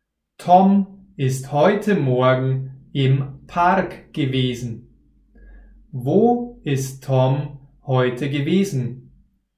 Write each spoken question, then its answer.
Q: Wo ist Tom heute gewesen?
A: Im Park. Tom ist heute im Park gewesen.